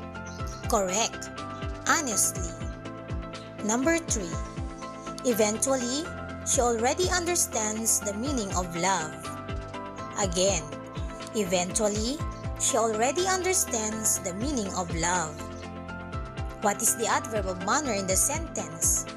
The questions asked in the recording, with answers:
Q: What is the adverb of manner in the sentence?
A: That's right, eventually.